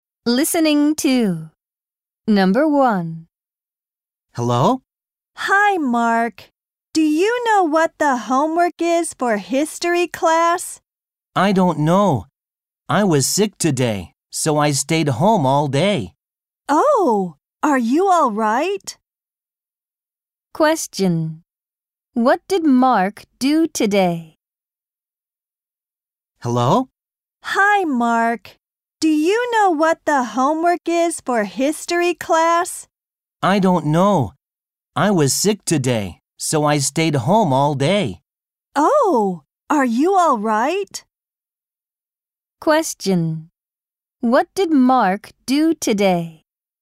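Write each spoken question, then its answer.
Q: What did Mark do today?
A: He stayed home all day because he was sick.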